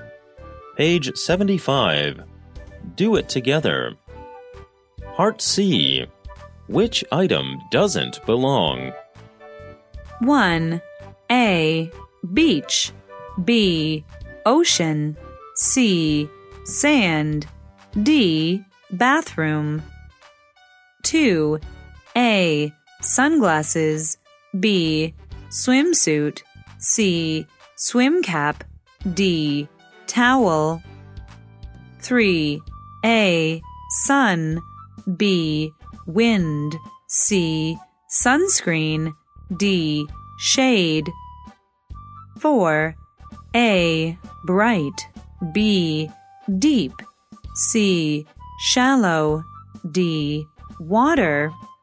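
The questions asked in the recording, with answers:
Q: Which item doesn't belong?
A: D: Bathroom

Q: Which item doesn't belong?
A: D: Water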